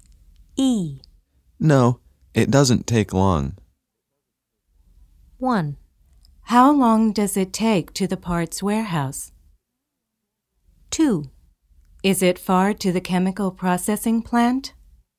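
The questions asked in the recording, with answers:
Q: No, it doesn't take long.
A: 2: Is it far to the chemical processing plant?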